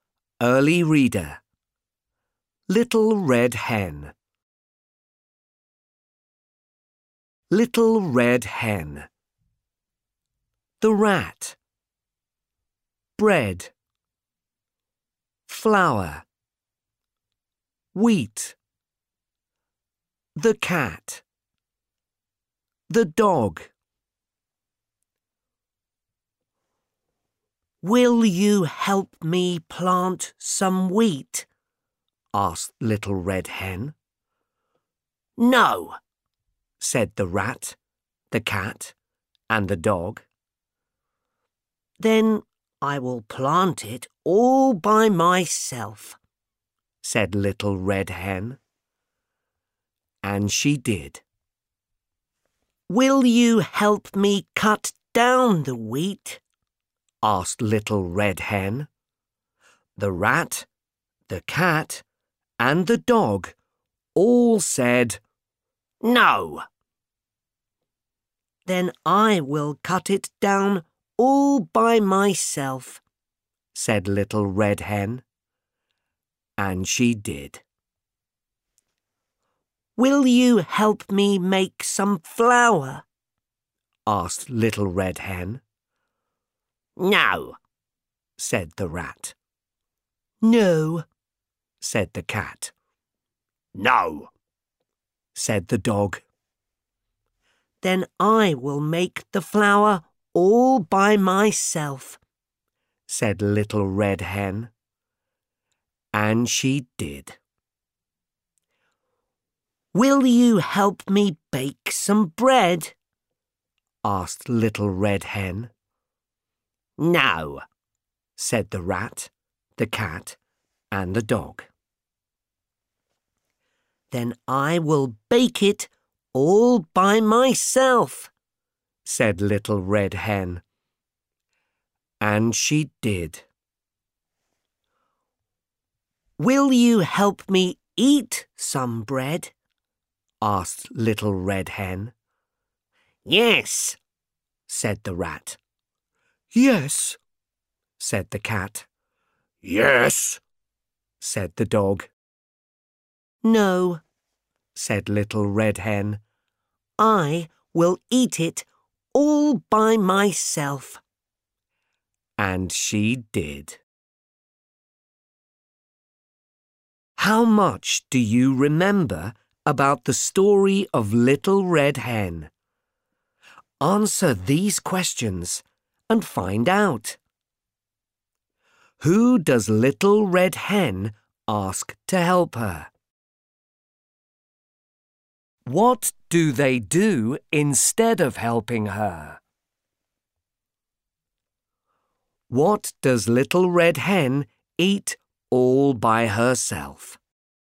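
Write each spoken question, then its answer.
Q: Who does Little Red Hen ask to help her?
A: The Rat, the Cat and the Dog

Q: What does Little Red Hen eat all by herself?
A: The bread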